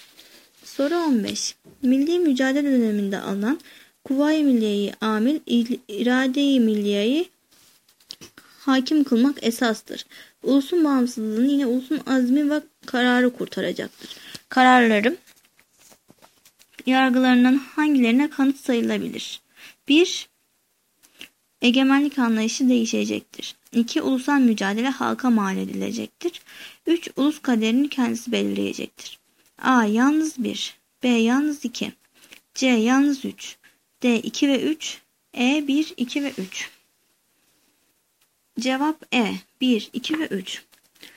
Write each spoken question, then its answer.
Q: Kararların yargılarından hangilerine kanıt sayılabilir?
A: Cevap E. 1, 2 ve 3.